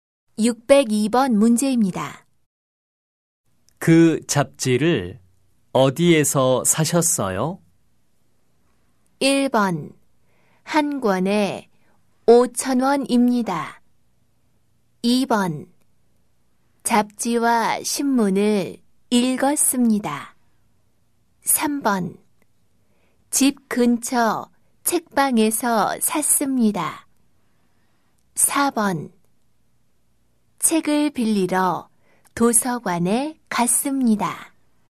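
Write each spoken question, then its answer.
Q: 그 잡지를 어디에서 사셨어요?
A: 3: 집 근처 책방에서 샀습니다.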